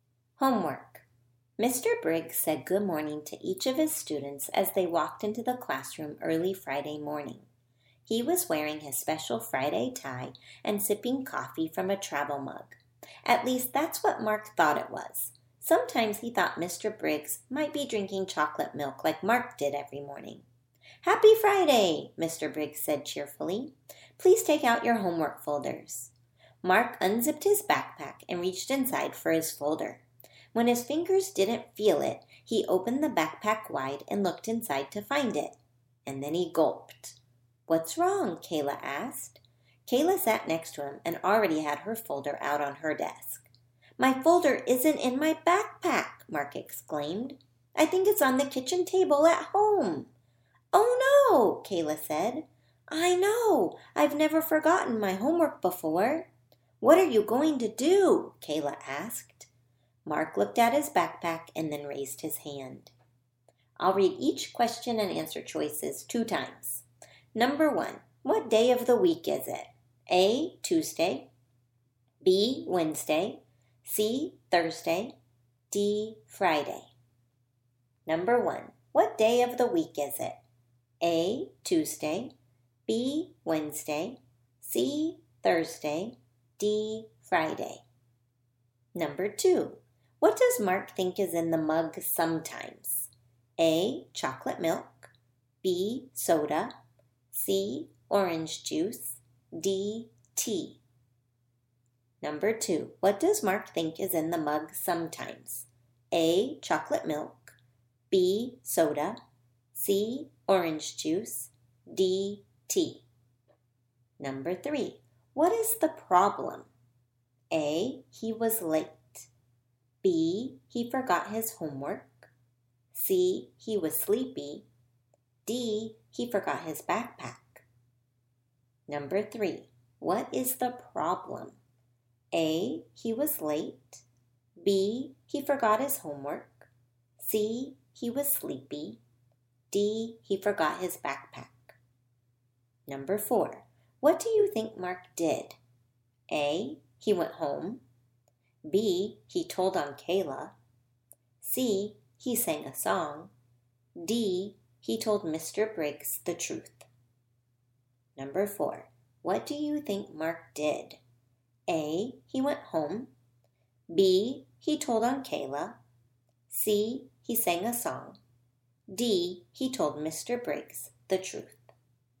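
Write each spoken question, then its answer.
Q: what day of the week is it?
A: D: Friday

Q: what does Mark think is in the mug sometimes?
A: A: chocolate milk

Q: what is the problem?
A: B: he forgot his homework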